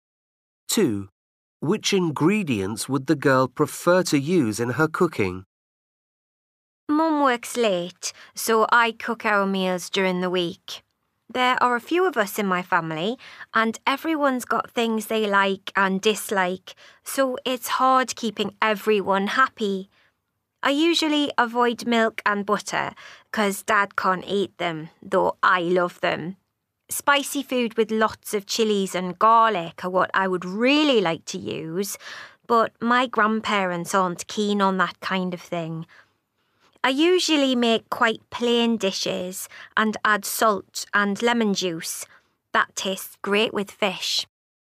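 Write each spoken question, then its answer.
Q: Which ingredients would the girl prefer to use in her cooking?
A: chilies and garlic (spicy food)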